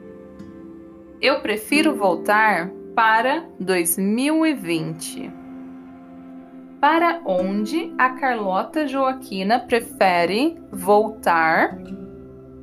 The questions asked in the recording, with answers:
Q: Para onde a Carlota Joaquina prefere voltar?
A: Para 2020 a Carlota Joaquina prefere voltar para o ano de 2020.